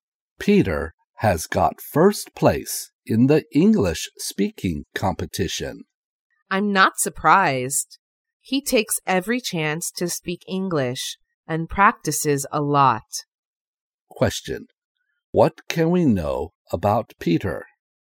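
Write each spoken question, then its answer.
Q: What can we know about Peter?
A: He got first place in the English speaking competition.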